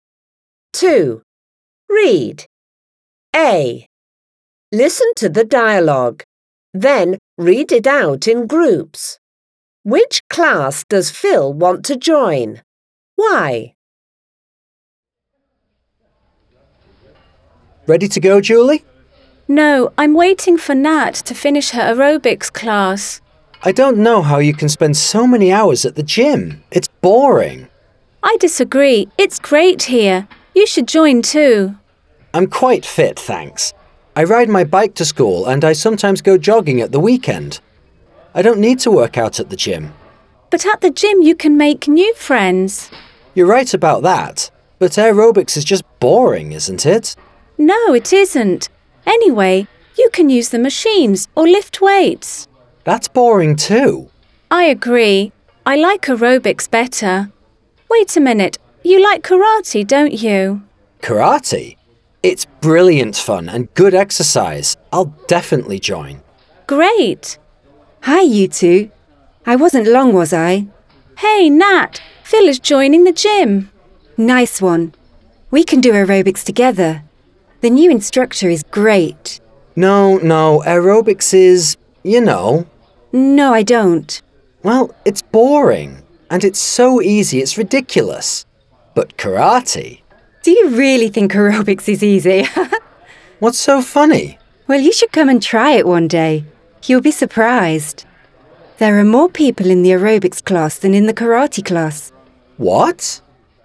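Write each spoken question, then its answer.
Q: Which class does Phil want to join?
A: Karate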